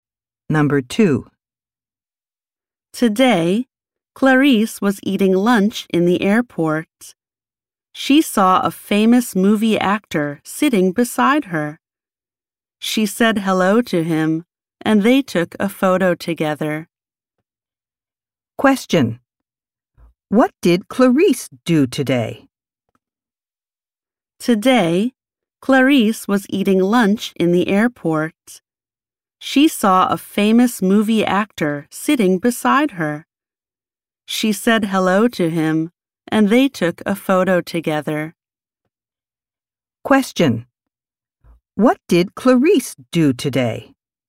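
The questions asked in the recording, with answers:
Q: What did Clarice do today?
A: She met a famous movie actor at the airport and took a photo with him.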